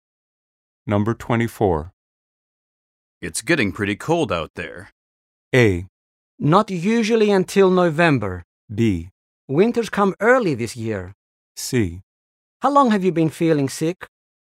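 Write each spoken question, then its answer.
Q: It's getting pretty cold out there.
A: B: Winter's come early this year.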